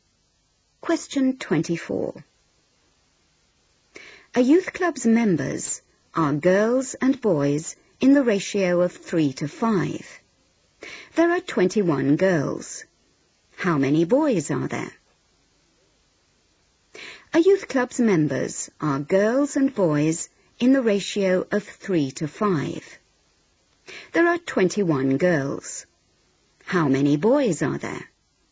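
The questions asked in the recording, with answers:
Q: There are 21 girls. How many boys are there?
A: 35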